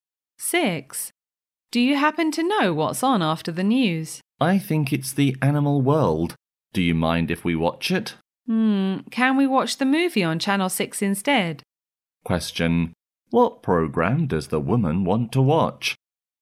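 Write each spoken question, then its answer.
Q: What program does the woman want to watch?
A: The movie on Channel 6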